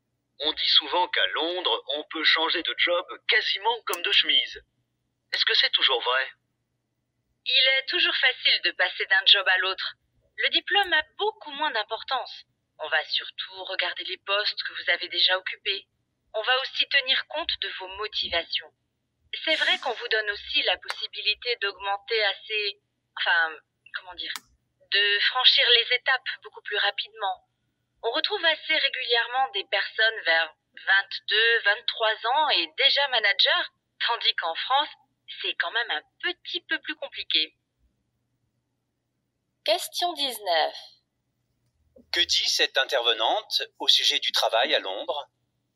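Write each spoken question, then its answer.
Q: Que dit cette intervenante au sujet du travail à Londres ?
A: Il est facile de changer d'emploi, le diplôme compte moins que l'expérience, et on peut évoluer très vite.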